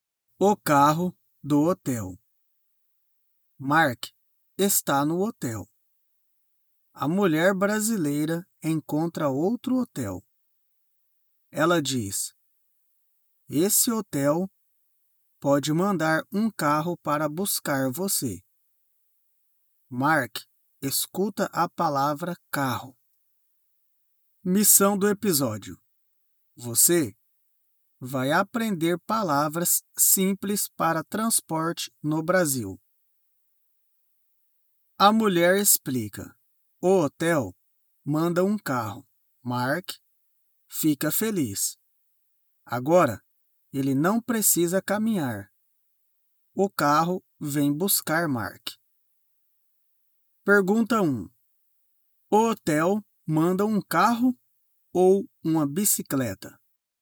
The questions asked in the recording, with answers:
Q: O hotel manda um carro ou uma bicicleta?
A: O hotel manda um carro.